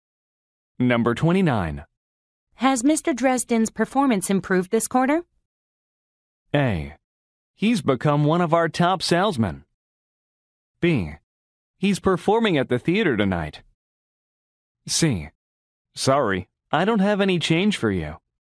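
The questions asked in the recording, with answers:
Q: Has Mr. Dresden's performance improved this quarter?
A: A: He's become one of our top salesmen.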